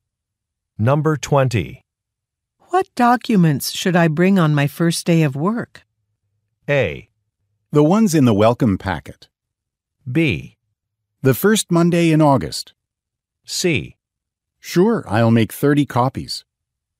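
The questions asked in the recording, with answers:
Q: What documents should I bring on my first day of work?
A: A: The ones in the welcome packet.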